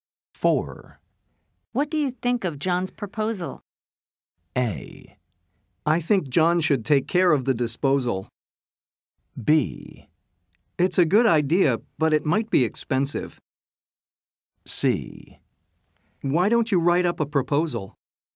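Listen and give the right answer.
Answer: B: It's a good idea, but it might be expensive.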